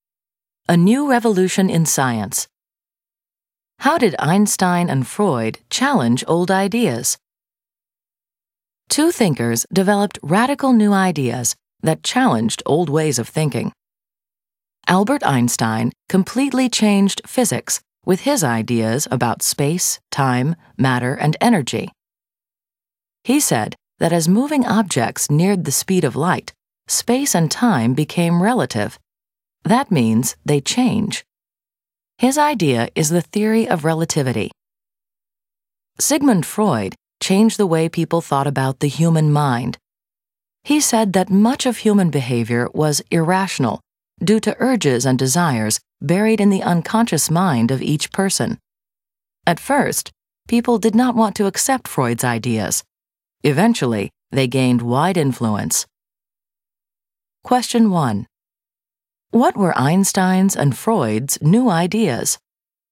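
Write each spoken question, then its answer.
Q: What were Einstein's and Freud's new ideas?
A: Einstein: the theory of relativity (space and time are relative); Freud: much human behavior is irrational, driven by urges buried in the unconscious mind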